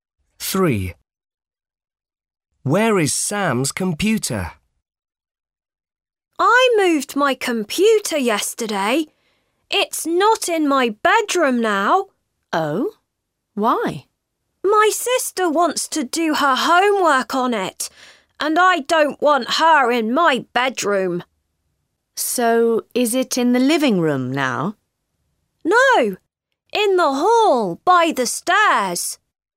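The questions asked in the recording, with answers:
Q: Where is Sam's computer?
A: in the hall by the stairs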